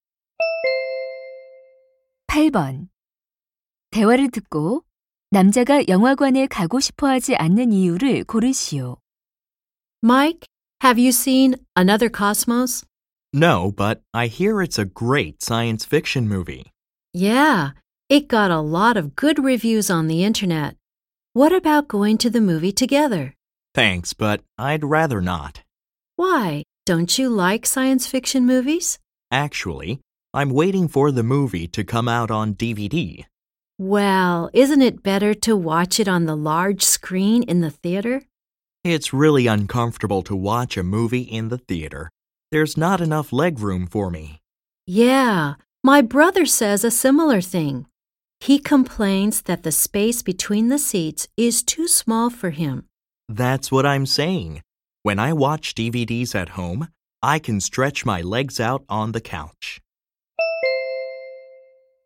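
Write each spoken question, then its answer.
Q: 대화를 듣고 남자가 영화관에 가고 싶어 하지 않는 이유를 고르시오.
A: 좌석 간 다리 공간이 좁아 불편해서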